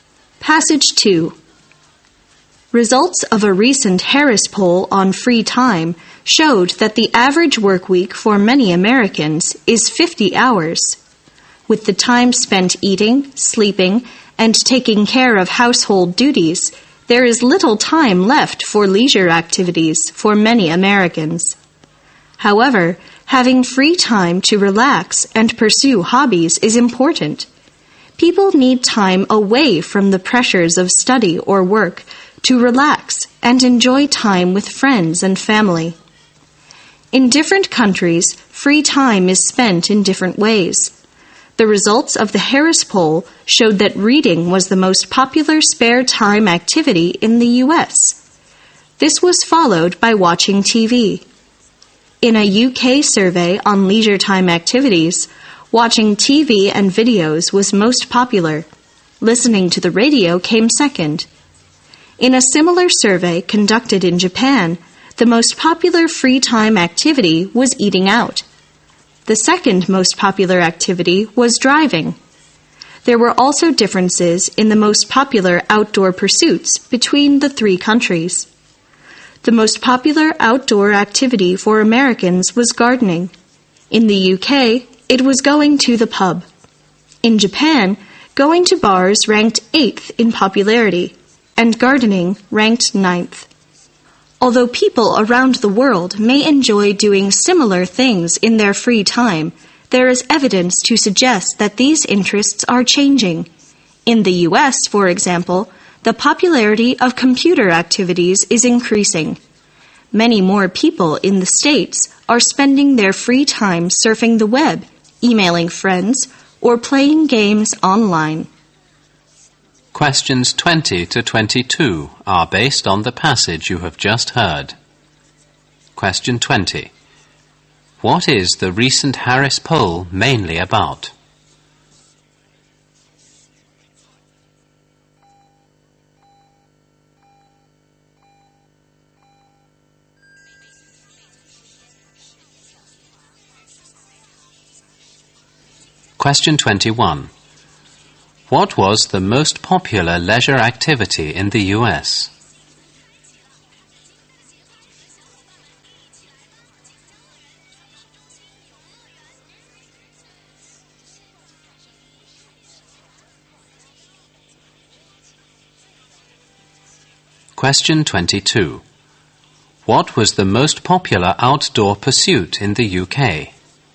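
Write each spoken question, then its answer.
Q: What is the recent Harris poll mainly about?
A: How people spend their free time

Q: What was the most popular leisure activity in the U.S.?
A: Reading

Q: What was the most popular outdoor pursuit in the U.K.?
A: Going to the pub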